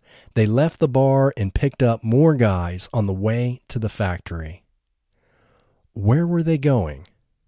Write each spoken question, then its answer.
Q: Where were they going?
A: They were going to the factory.